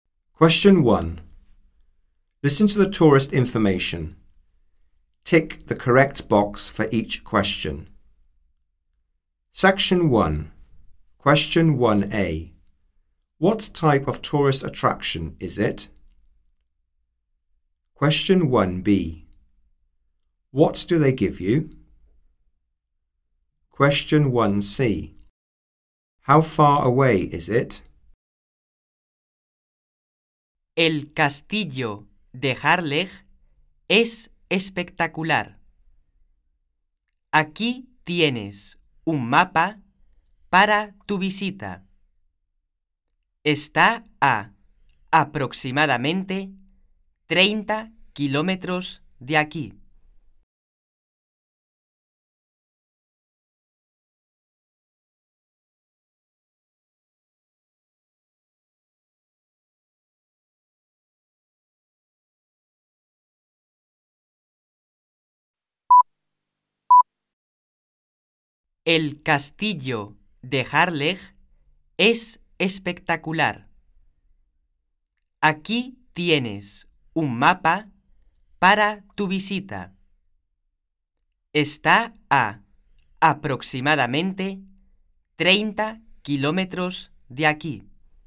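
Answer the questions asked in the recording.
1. A castle (Harlech Castle)
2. A map
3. About 30 kilometres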